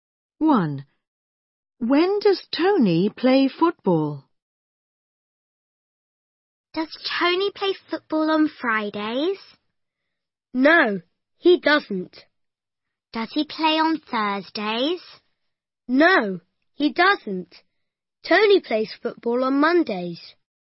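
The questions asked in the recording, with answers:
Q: When does Tony play football?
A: On Mondays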